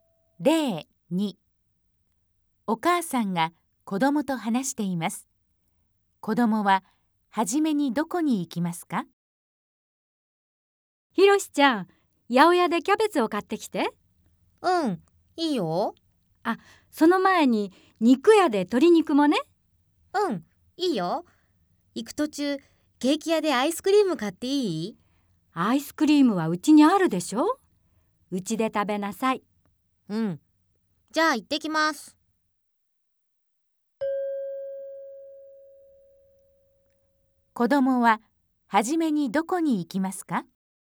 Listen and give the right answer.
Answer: 正しい答えは2です。